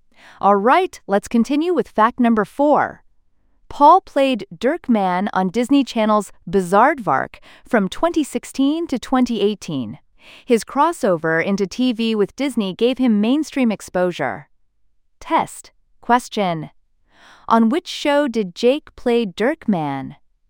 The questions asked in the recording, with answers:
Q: on which show did Jake play Dirk Mann?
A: Bizardvark.